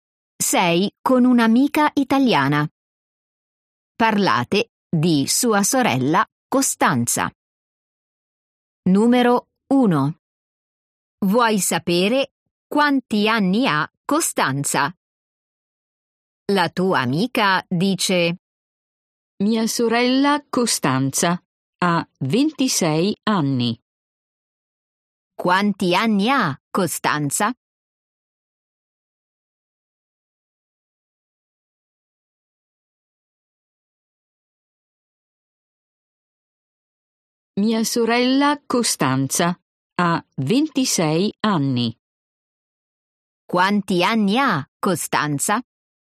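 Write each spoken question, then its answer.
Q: Quanti anni ha Costanza?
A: 26 anni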